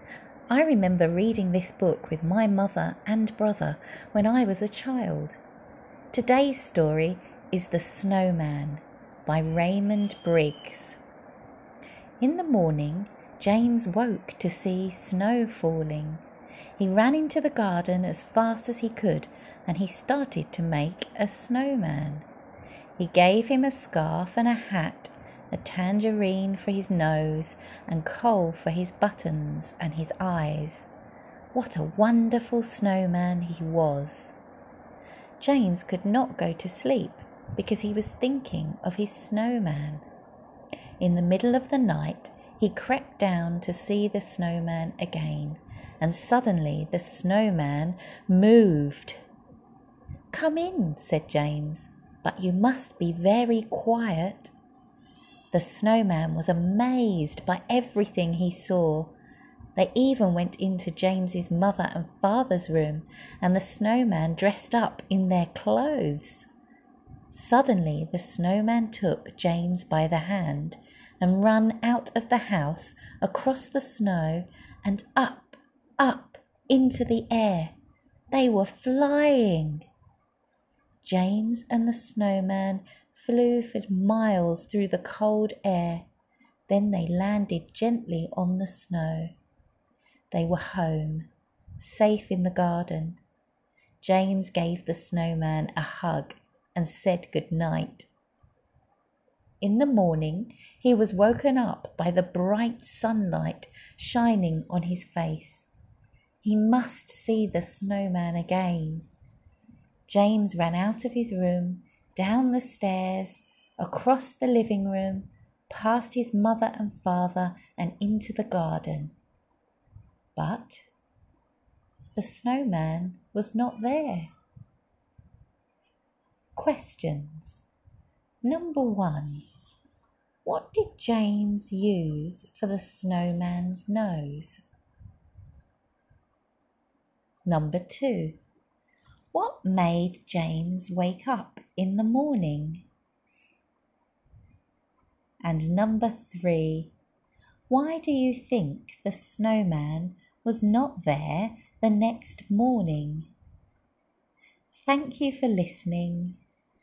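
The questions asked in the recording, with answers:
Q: what did James use for the snowman's nose?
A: a tangerine

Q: what made James wake up in the morning?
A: the bright sunlight shining on his face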